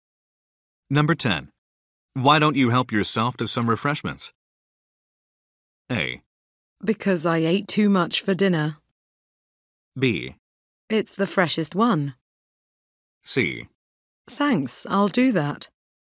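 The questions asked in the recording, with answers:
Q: Why don't you help yourself to some refreshments?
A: C: Thanks, I'll do that.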